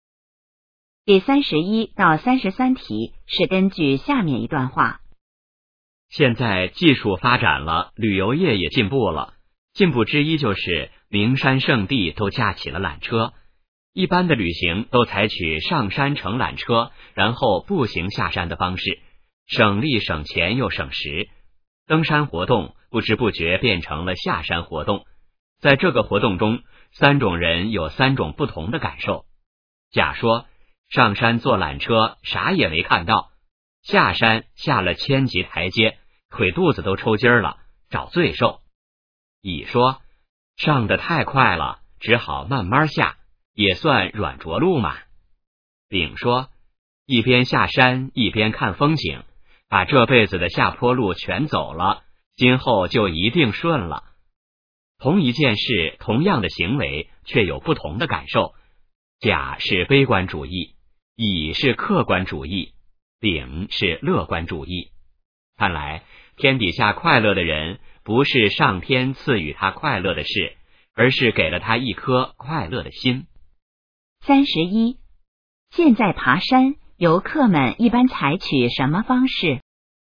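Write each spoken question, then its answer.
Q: 现在爬山,游客们一般采取什么方式?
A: 上山乘缆车,然后步行下山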